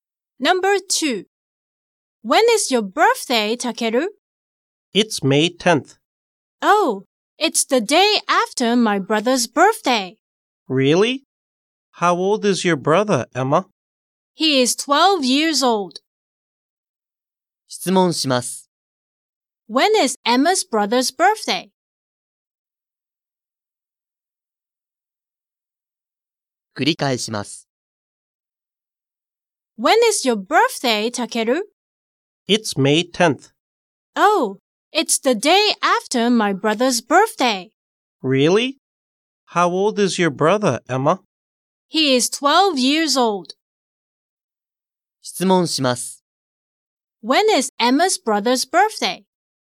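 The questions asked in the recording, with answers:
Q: When is Emma's brother's birthday?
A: May 9th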